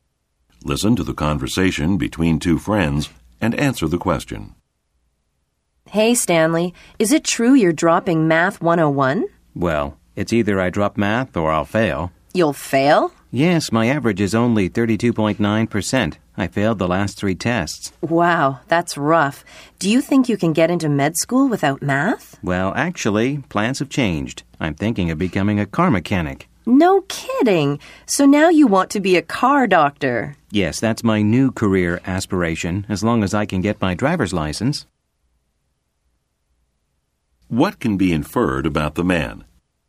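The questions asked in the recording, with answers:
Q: What can be inferred about the man?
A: He no longer plans to go to medical school; he now wants to become a car mechanic.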